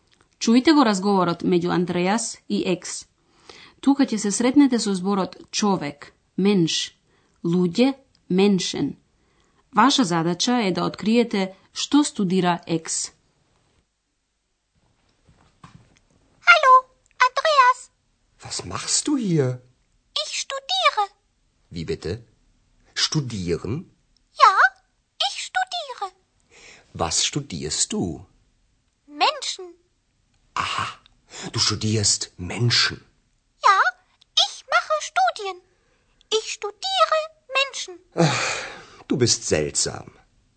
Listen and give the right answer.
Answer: Екс значи ги студира луѓето.